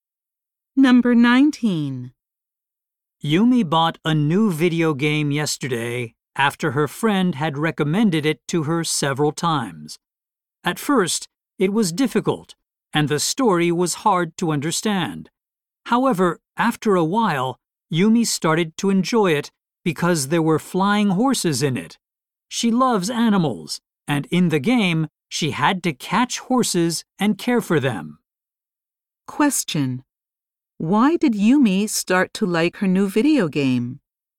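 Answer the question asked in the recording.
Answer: It had flying horses, and she loves animals.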